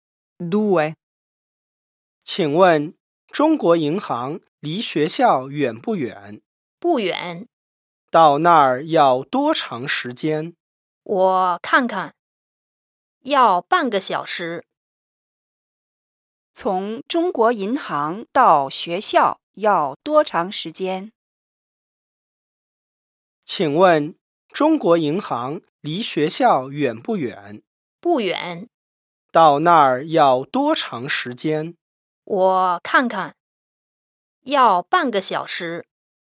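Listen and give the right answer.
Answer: 半个小时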